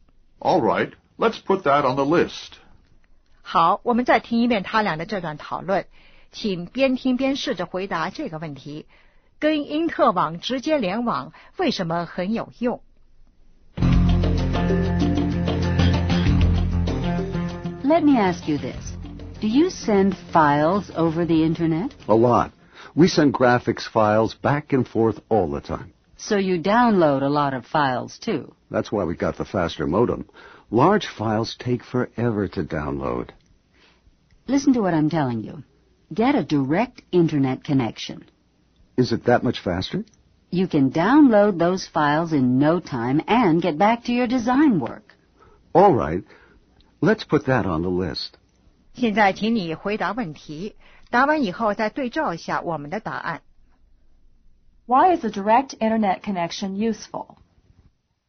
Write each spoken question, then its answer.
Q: Why is a direct internet connection useful?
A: To download files faster.